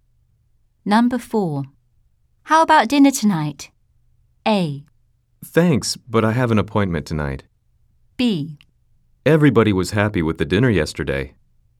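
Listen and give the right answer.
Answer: A: Thanks, but I have an appointment tonight.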